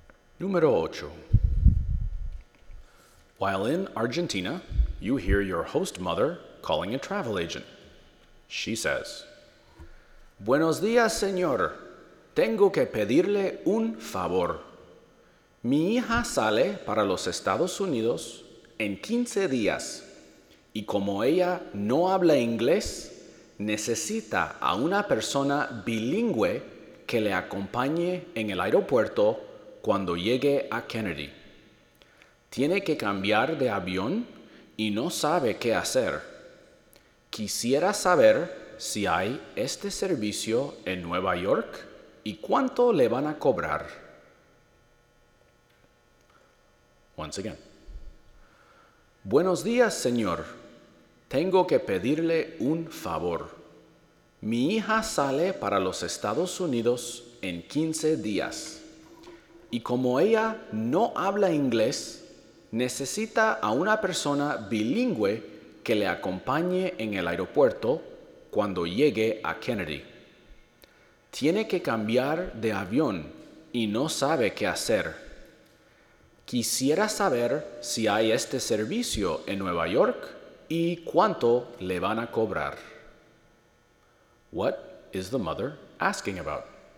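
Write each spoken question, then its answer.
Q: What is the mother asking about?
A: Whether New York has a service where a bilingual person meets her daughter at Kennedy airport to help her change planes, and how much it costs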